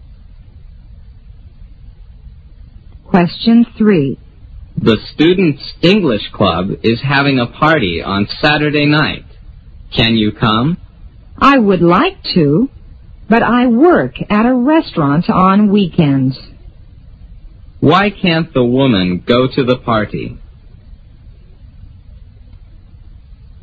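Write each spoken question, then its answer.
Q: Why can't the woman go to the party?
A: She works at a restaurant on weekends.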